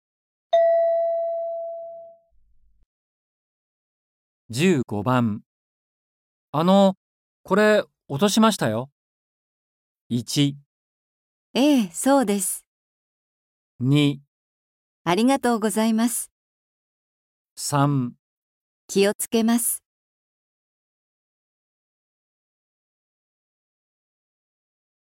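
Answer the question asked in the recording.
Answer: ありがとうございます。

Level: N4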